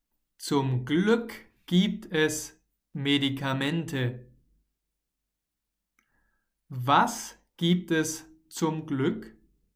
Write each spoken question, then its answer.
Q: Was gibt es zum Glück?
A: Medikamente. Zum Glück, denkt sich Diana, gibt es Medikamente.